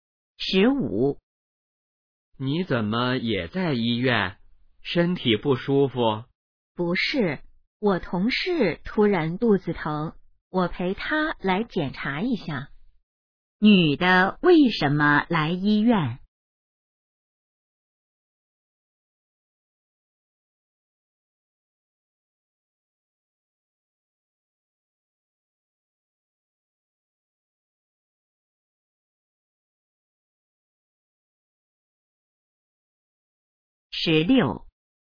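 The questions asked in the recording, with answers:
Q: 女的为什么来医院?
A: 陪同事来检查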